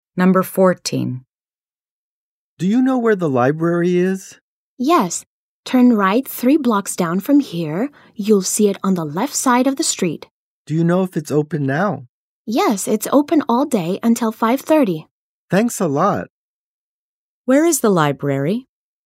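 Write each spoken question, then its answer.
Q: Where is the library?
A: Turn right, 3 blocks down, on the left side of the street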